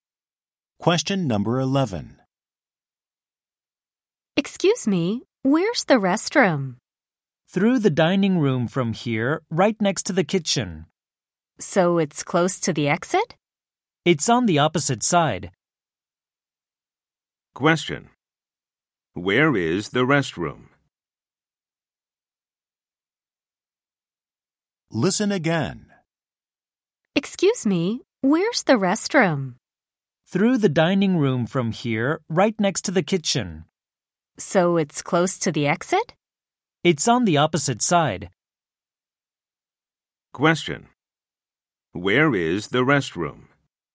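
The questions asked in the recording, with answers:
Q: Where is the restroom?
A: Through the dining room, next to the kitchen, on the side opposite the exit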